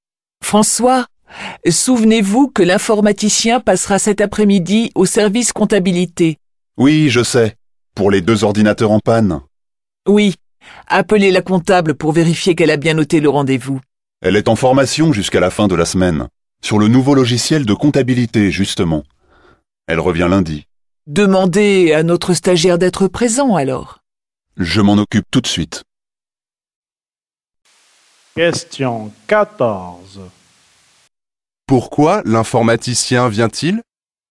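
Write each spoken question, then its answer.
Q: Pourquoi l'informaticien vient-il ?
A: Pour deux ordinateurs en panne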